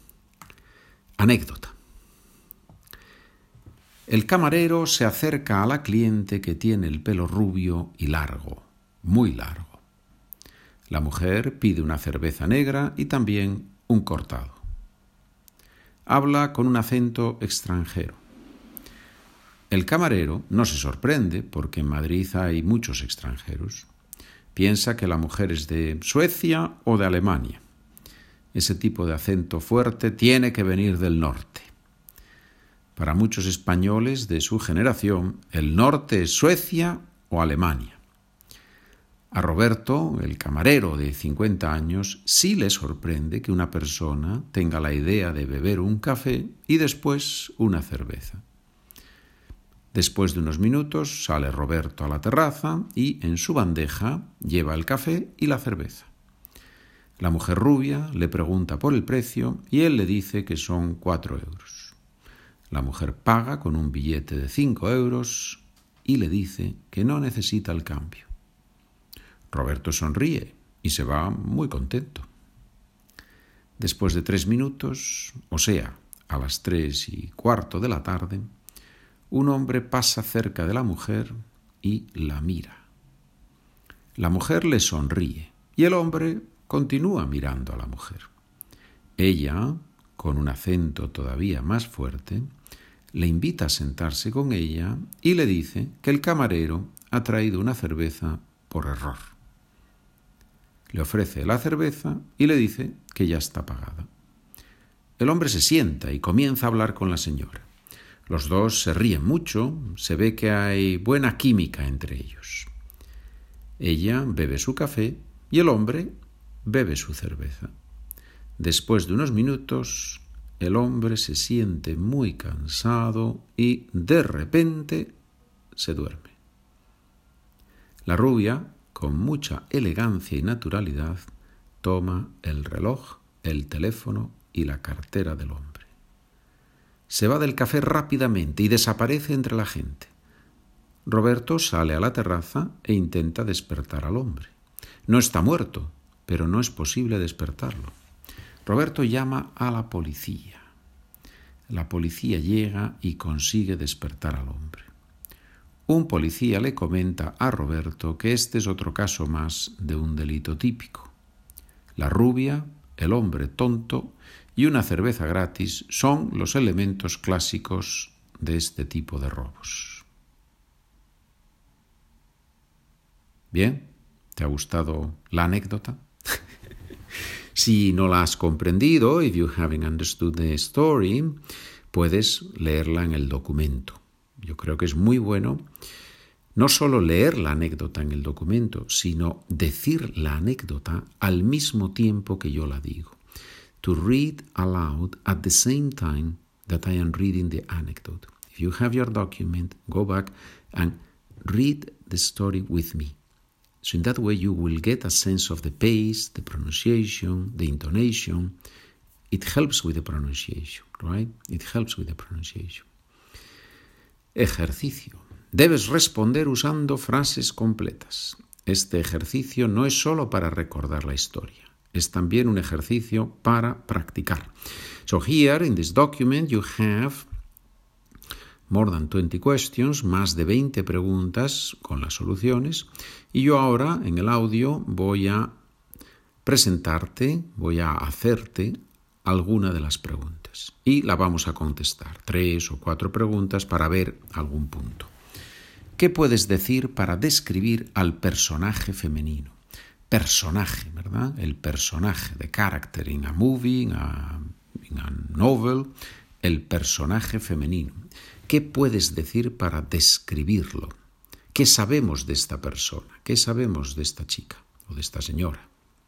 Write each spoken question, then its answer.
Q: ¿Qué puedes decir para describir al personaje femenino?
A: Lo que sabemos es que ella es rubia y que habla con un acento extranjero.